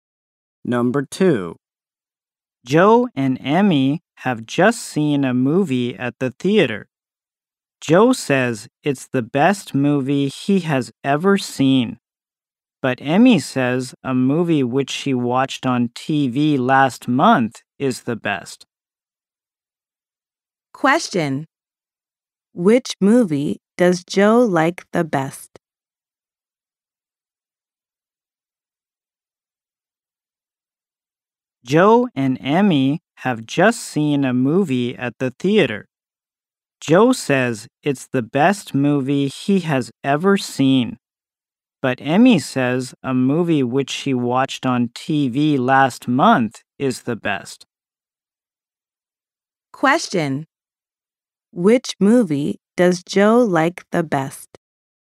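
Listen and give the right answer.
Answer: The movie he has just seen at the theater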